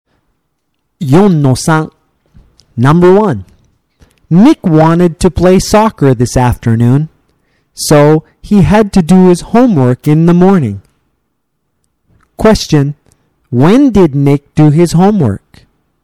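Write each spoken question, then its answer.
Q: When did Nick do his homework?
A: In the morning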